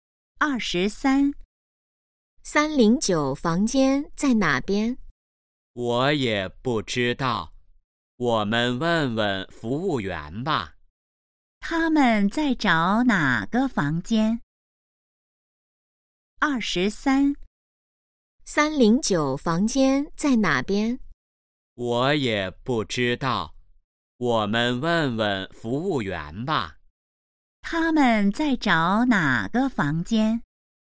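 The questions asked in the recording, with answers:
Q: 他们在找哪个房间?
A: 309房间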